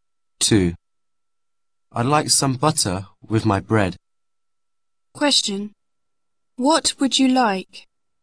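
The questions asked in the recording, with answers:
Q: What would you like?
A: some butter with my bread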